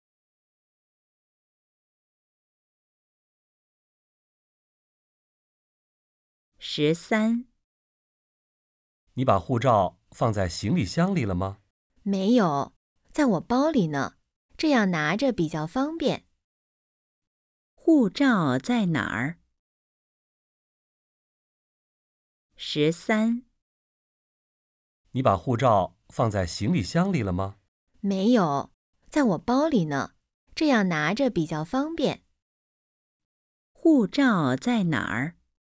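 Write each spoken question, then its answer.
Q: 护照在哪儿?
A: 在包里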